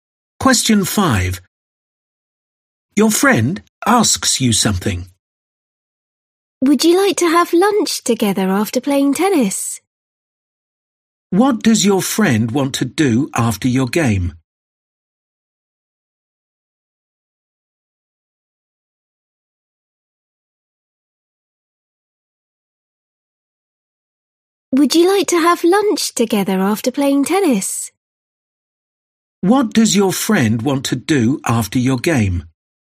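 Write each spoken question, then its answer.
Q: What does your friend want to do after your game?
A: have lunch together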